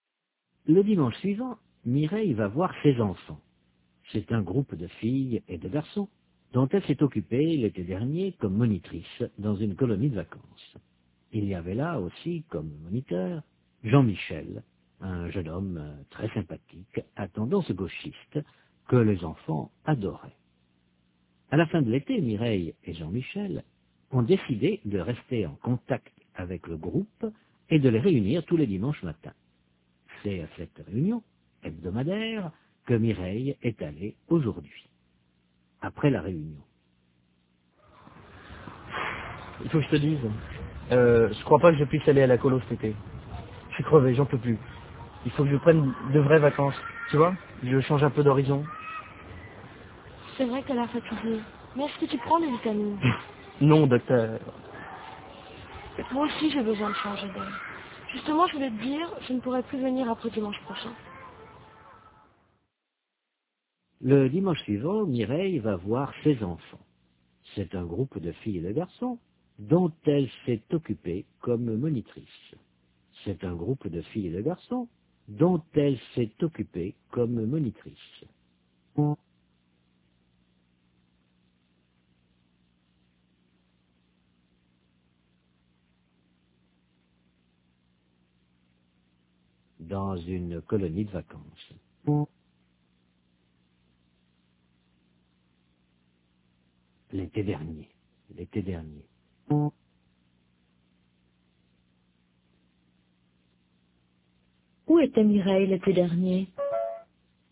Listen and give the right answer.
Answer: Dans une colonie de vacances.